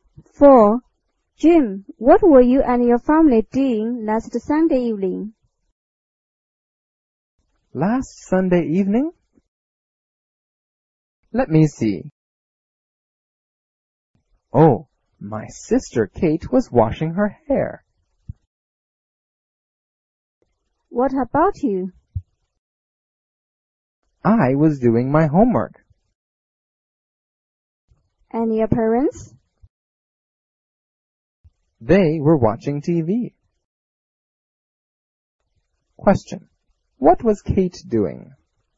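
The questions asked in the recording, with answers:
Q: What was Kate doing?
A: Washing her hair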